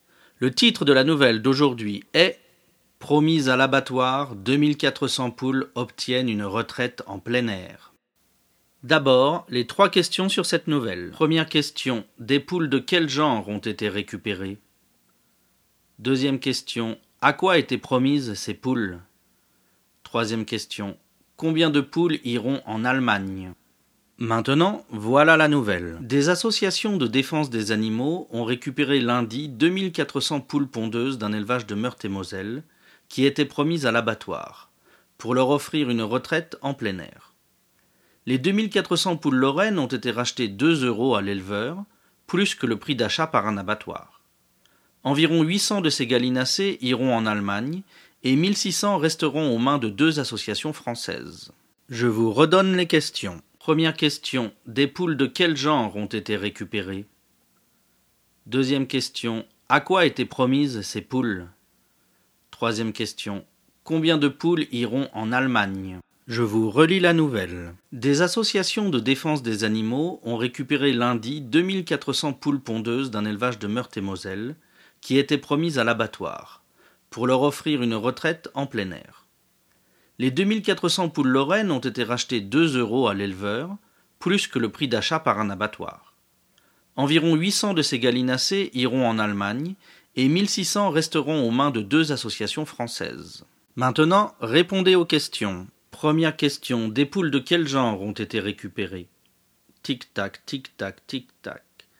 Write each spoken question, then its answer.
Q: des poules de quel genre ont été récupérées?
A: Réponse, des poules pondeuses.

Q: à quoi étaient promises ces poules?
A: Réponse, elles étaient promises à l'abattoir.

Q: combien de poules iront en Allemagne?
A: Réponse, 800 poules iront en Allemagne.